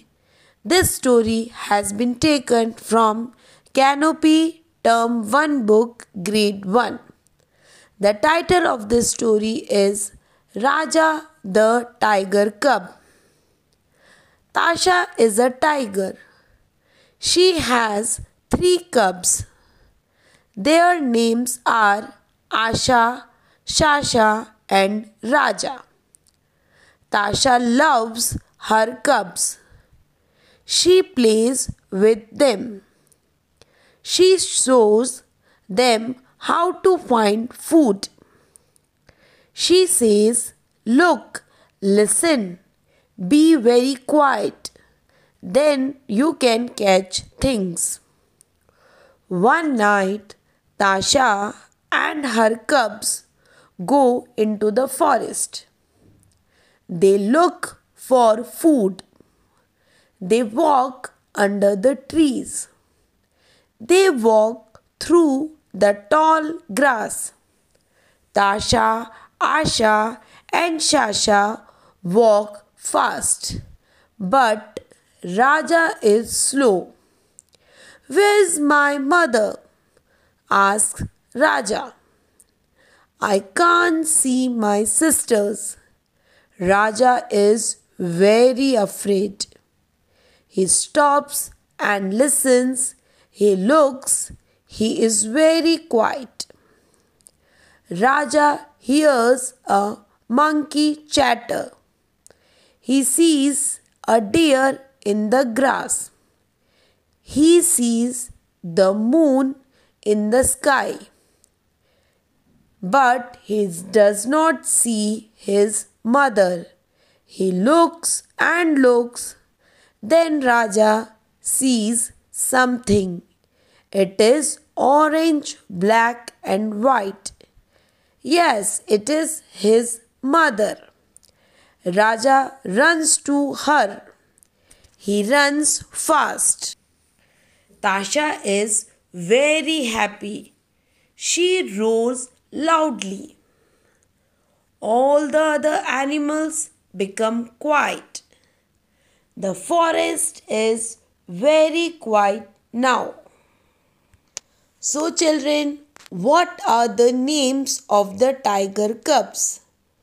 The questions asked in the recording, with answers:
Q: So children, what are the names of the tiger cubs?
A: The names of the tiger cubs are Asha, Shasha, and Raja.